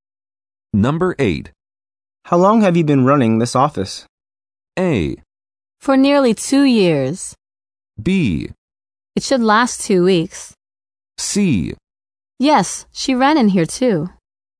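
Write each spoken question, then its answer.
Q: How long have you been running this office?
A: A: For nearly 2 years.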